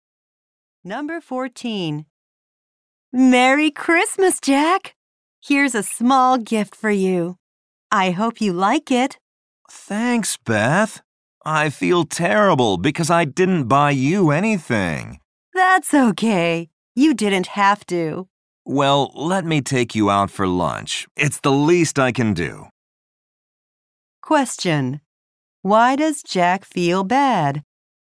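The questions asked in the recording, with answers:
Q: Why does Jack feel bad?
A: He didn't buy Beth a gift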